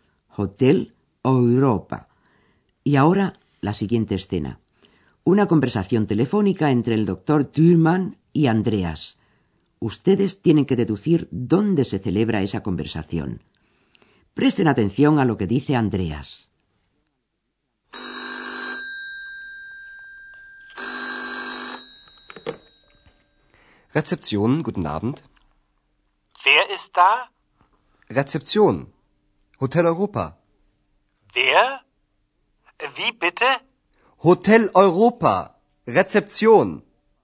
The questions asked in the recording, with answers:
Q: Ustedes tienen que deducir dónde se celebra esa conversación.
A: El curso se desarrolla, pues, en el hotel.